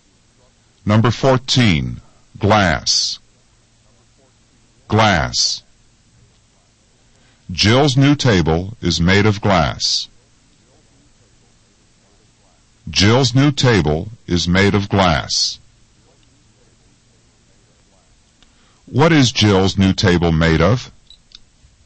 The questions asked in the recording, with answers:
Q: What is Jill's new table made of?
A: The answer is, it's made of glass.